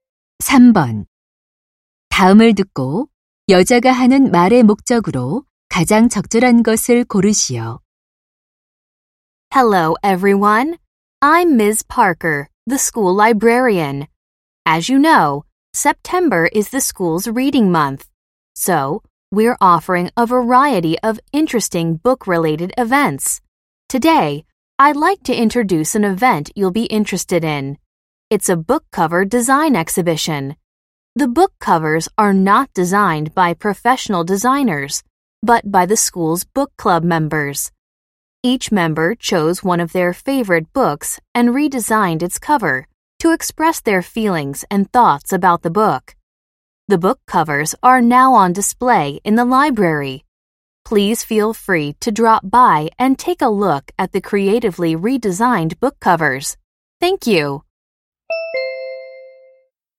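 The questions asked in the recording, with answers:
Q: 다음을 듣고 여자가 하는 말의 목적으로 가장 적절한 것을 고르시오.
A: 도서 표지 디자인 전시회를 소개하려고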